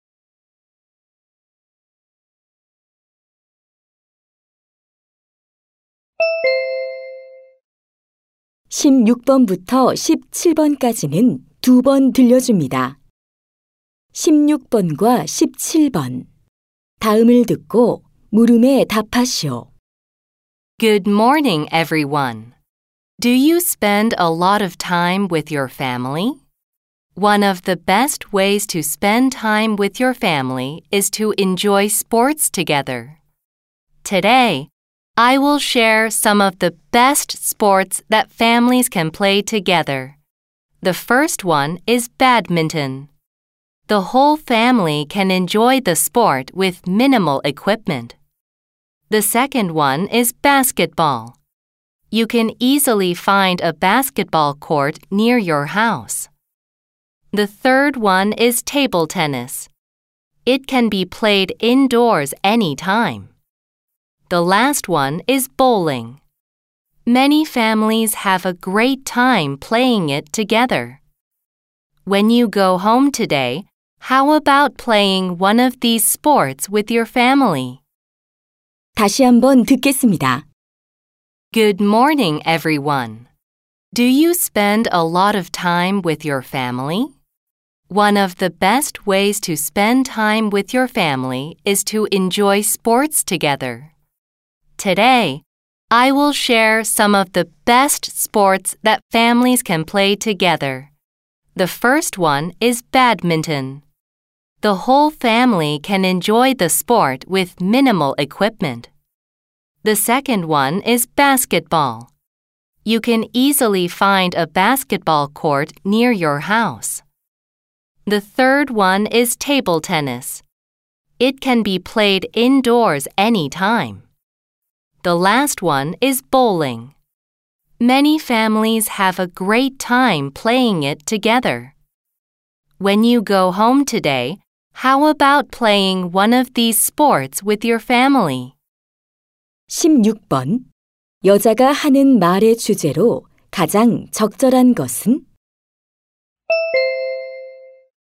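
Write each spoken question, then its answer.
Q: 여자가 하는 말의 주제로 가장 적절한 것은?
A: 가족이 함께 즐길 수 있는 스포츠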